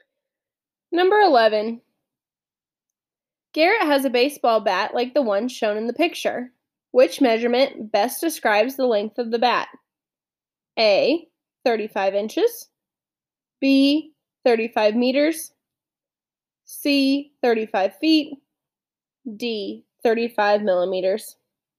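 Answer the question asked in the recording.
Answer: A: 35 inches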